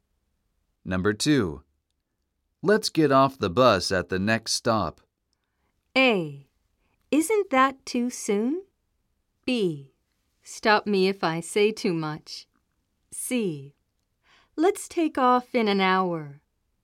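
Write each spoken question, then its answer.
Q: Let's get off the bus at the next stop.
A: A: Isn't that too soon?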